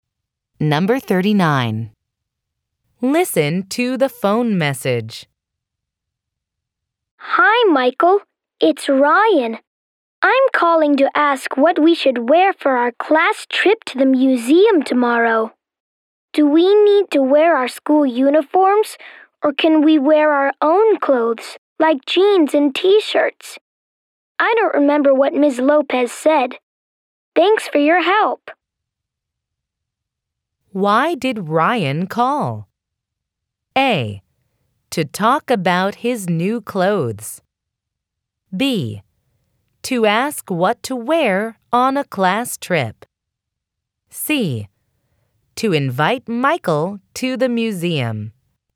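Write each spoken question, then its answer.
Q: Why did Ryan call?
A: B: To ask what to wear on a class trip.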